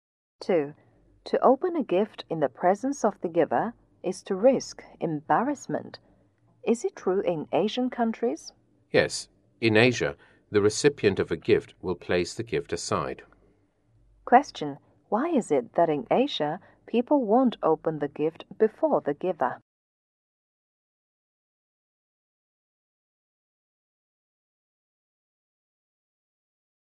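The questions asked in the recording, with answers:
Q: Why is it that in Asia, people won't open the gift before the giver?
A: To avoid risking embarrassment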